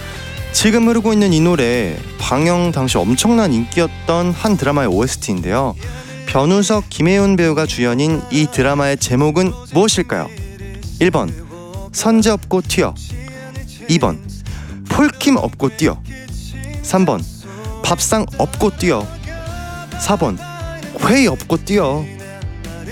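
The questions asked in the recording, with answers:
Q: 변우석, 김혜윤 배우가 주연인 이 드라마의 제목은 무엇일까요?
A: 1번: 선제 업고 튀어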